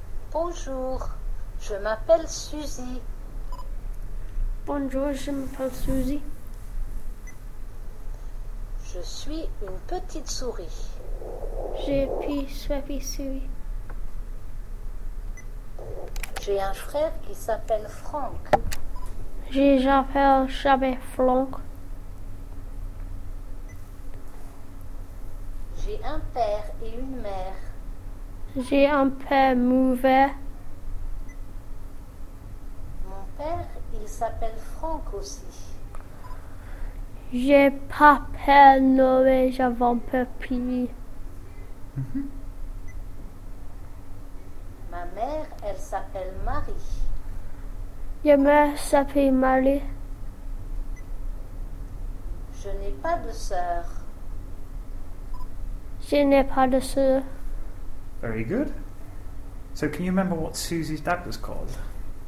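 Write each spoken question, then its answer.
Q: So, can you remember what Susie's dad was called?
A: Franck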